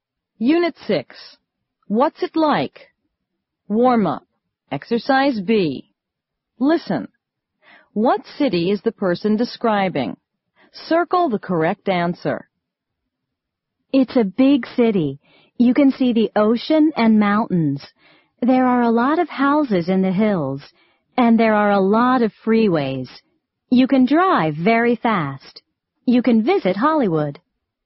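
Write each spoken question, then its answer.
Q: What city is the person describing?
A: Los Angeles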